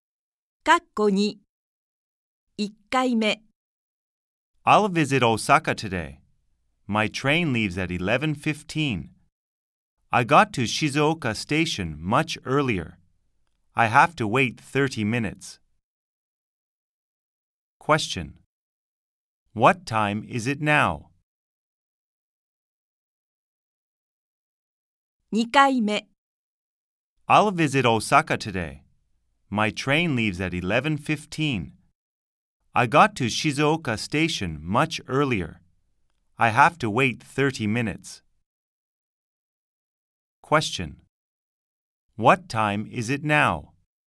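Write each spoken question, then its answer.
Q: Question. What time is it now?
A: 10:45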